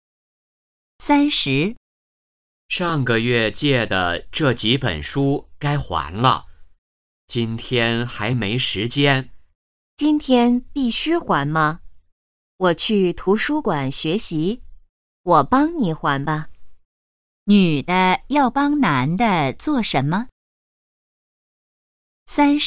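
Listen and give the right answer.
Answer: 还书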